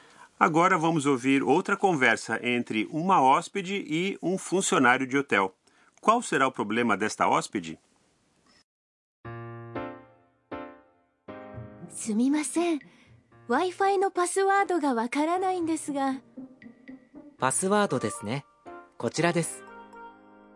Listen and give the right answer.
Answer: Por favor, eu não sei a senha para o Wi-Fi.